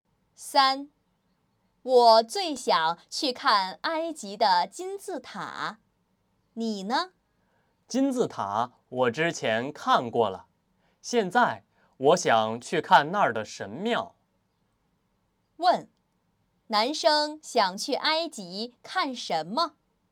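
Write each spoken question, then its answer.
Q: 男生想去埃及看什么?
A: 神庙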